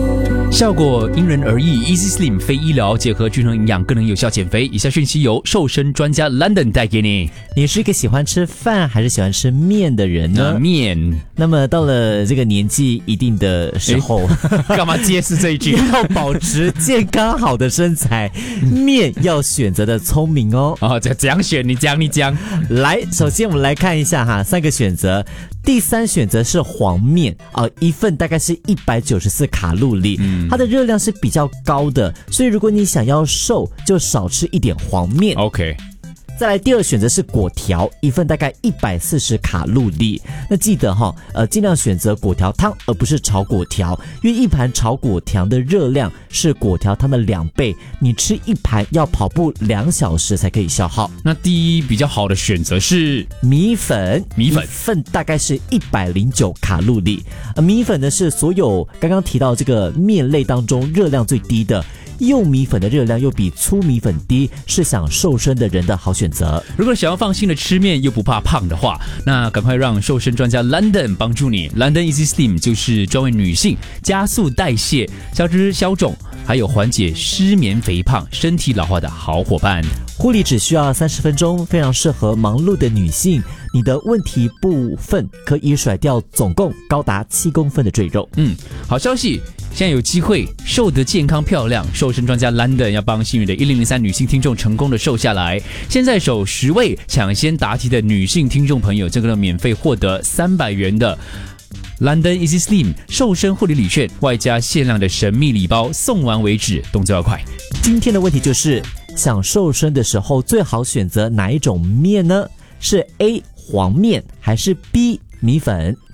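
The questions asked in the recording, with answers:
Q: 今天的问题就是,想瘦身的时候最好选择哪一种面呢?是 A 黄面还是 B 米粉?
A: B: 米粉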